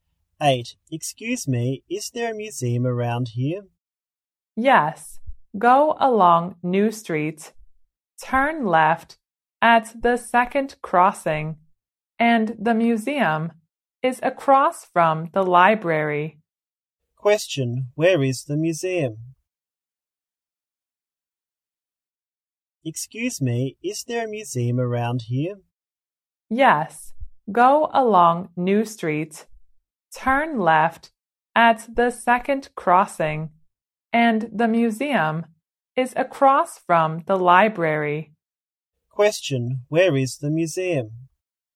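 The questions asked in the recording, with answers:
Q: Where is the museum?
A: Across from the library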